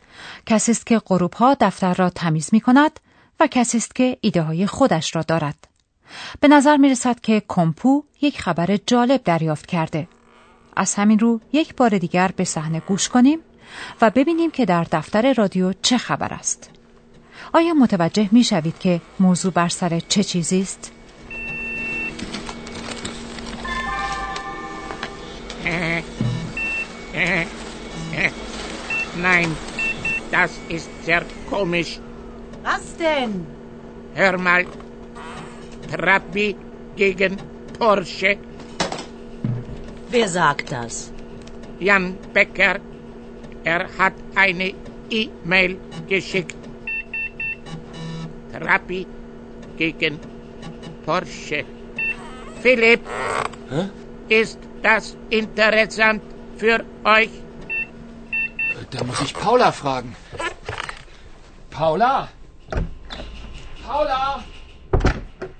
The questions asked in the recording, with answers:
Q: آیا متوجه می شوید که موضوع بر سر چه چیزی است؟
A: موضوع بر سر ماشین پورشه و ماشین ترابی است